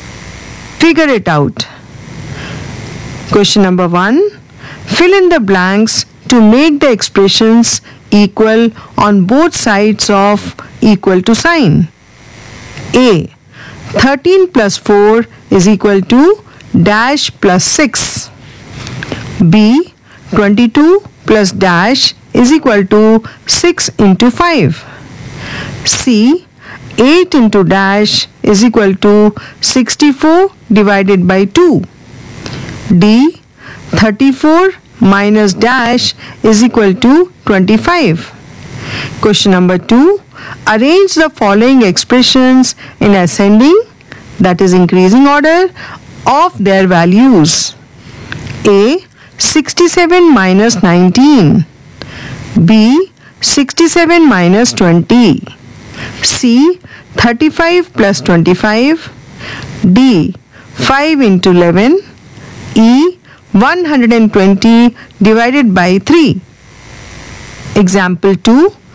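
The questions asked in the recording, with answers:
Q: A. 13 plus 4 is equal to dash plus 6.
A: 11

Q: Question number 2. Arrange the following expressions in ascending, that is increasing order, of their values.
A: E (40), B (47), A (48), D (55), C (60)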